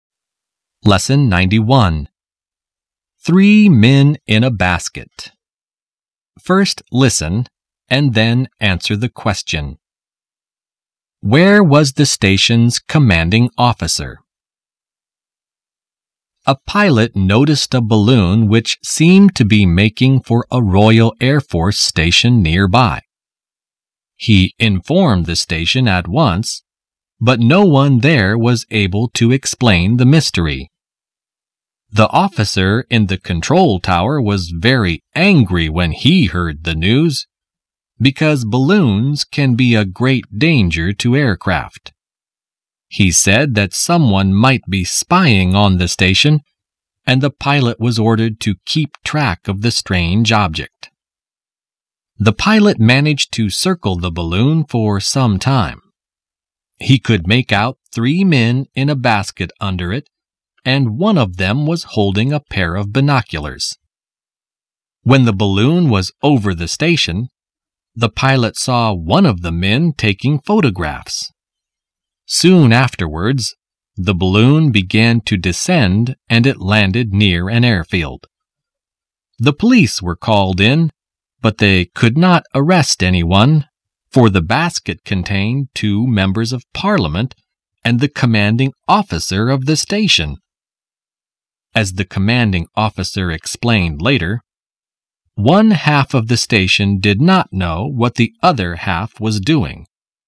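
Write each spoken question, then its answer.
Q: Where was the station's commanding officer?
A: In the balloon's basket, with two members of parliament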